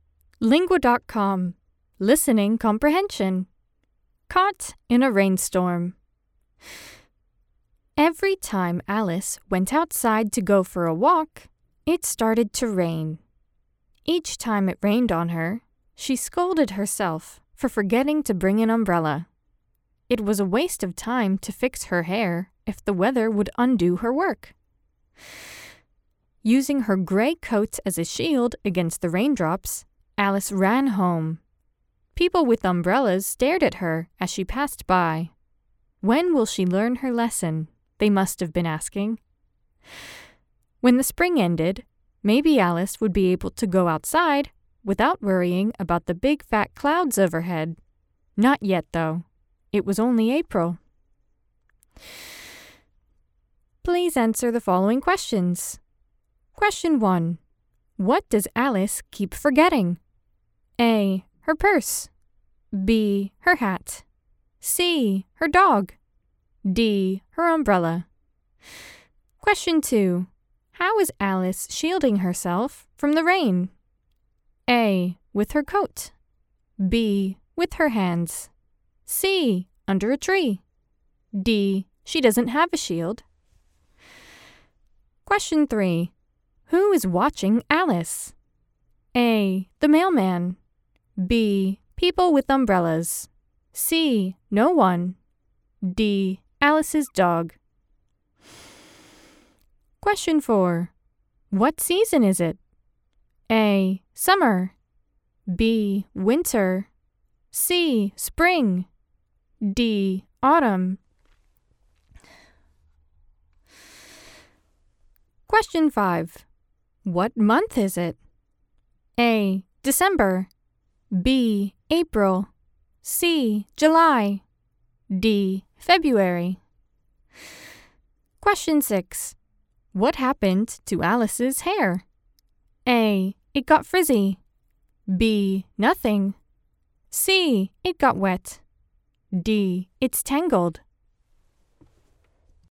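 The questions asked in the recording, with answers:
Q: What does Alice keep forgetting?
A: D: Her umbrella.

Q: How is Alice shielding herself from the rain?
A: A: With her coat.

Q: Who is watching Alice?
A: B: People with umbrellas.

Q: What season is it?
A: C: Spring.

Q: What month is it?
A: B: April.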